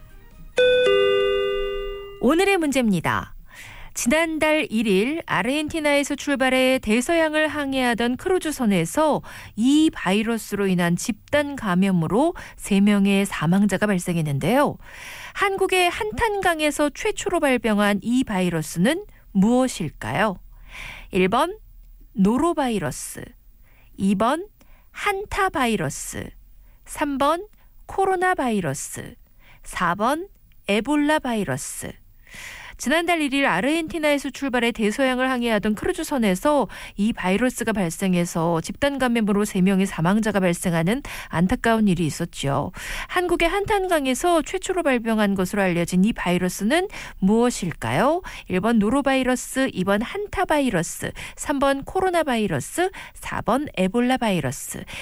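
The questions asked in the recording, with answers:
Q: 한국의 한탄강에서 최초로 발병한 것으로 알려진 이 바이러스는 무엇일까요?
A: 2번: 한타바이러스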